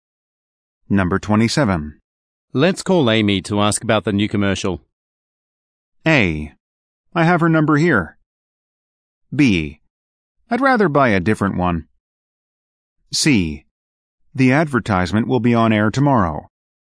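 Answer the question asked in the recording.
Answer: A: I have her number here.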